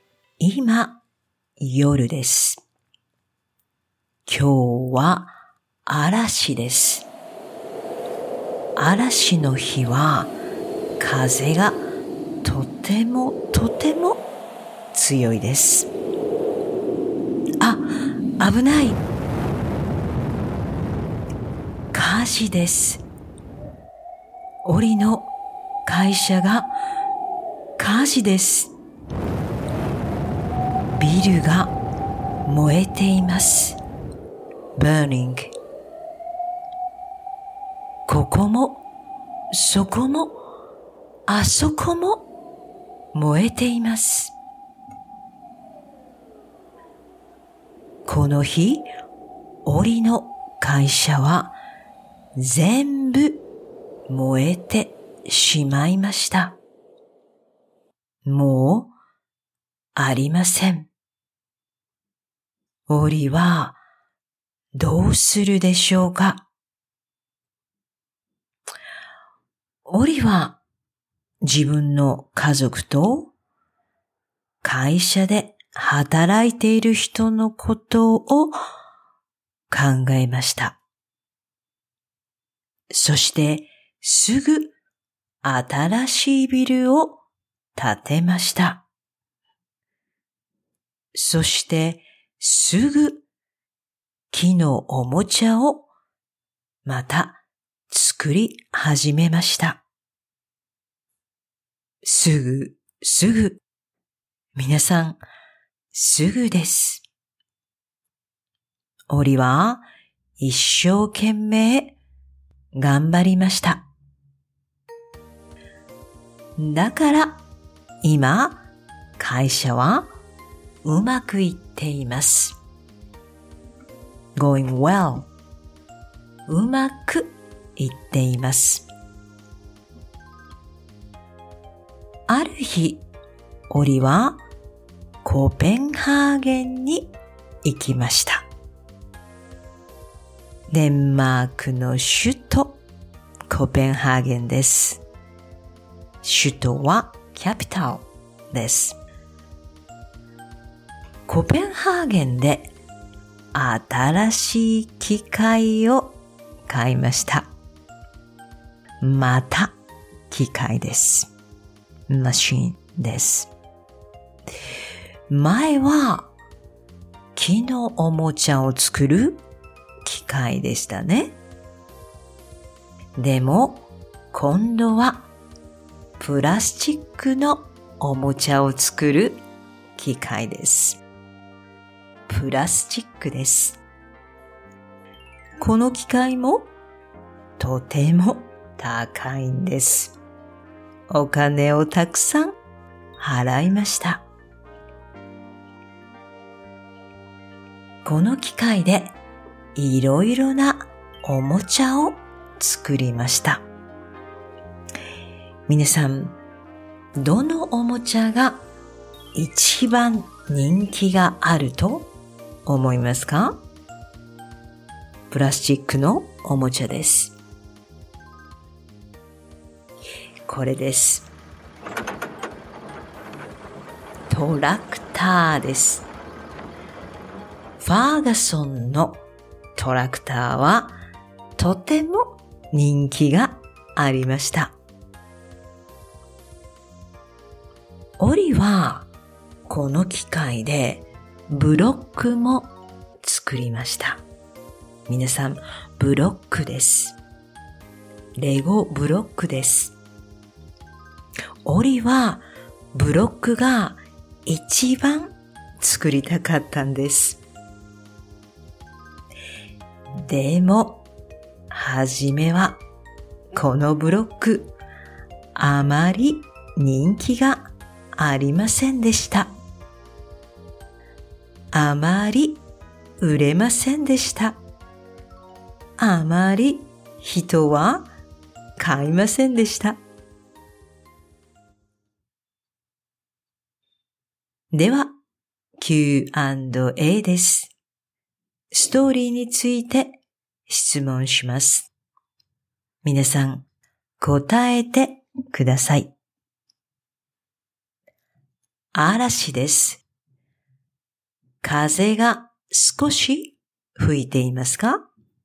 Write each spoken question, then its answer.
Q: 嵐です。風が少し吹いていますか?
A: いいえ、少しじゃありません。たくさん吹いています。